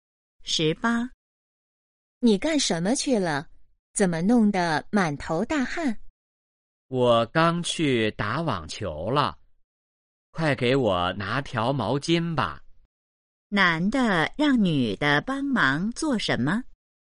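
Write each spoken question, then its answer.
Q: 男的让女的帮忙做什么?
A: 拿毛巾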